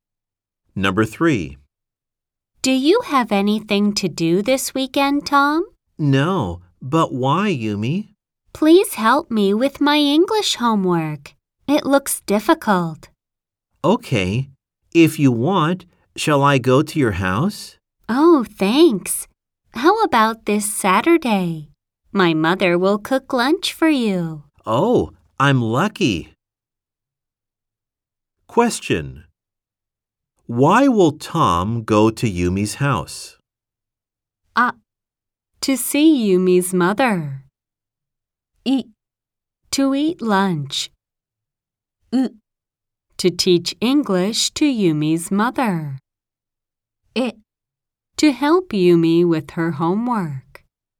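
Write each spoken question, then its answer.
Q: Why will Tom go to Yumi's house?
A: え: To help Yumi with her homework.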